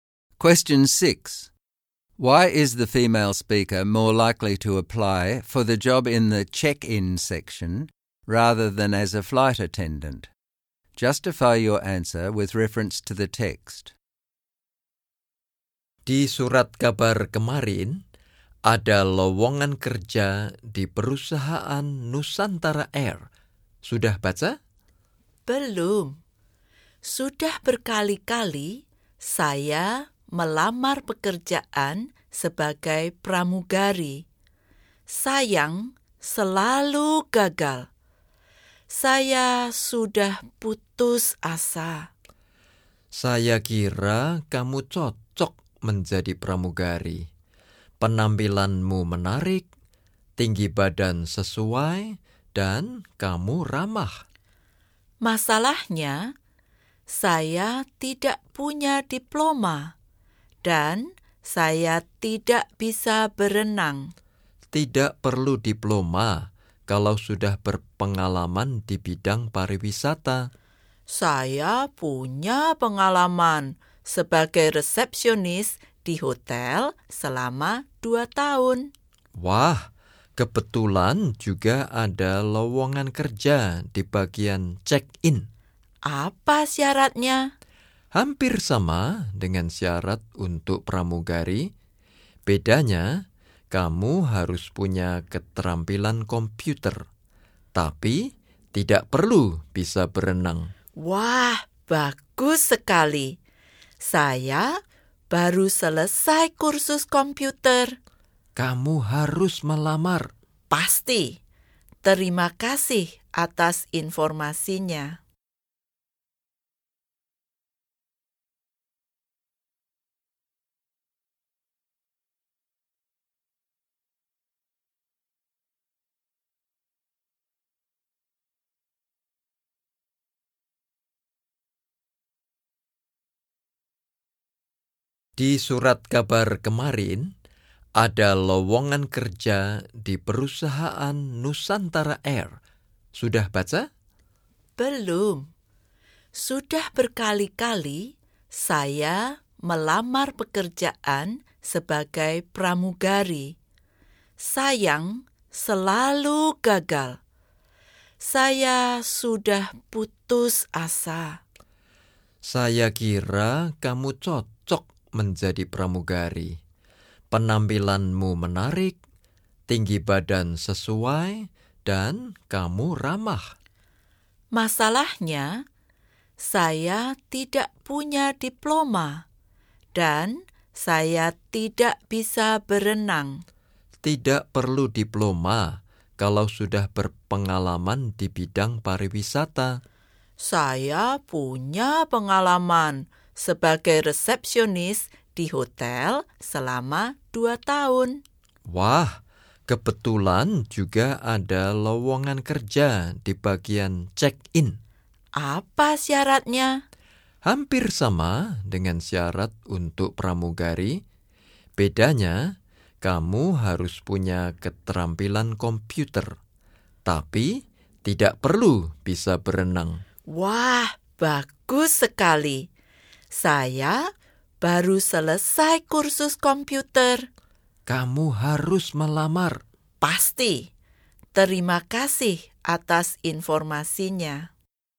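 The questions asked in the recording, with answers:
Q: Why is the female speaker more likely to apply for the job in the check-in section rather than as a flight attendant?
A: She cannot swim and has failed flight attendant applications many times. The check-in job does not require swimming but does require computer skills, and she has just finished a computer course. She also has 2 years of hotel reception experience.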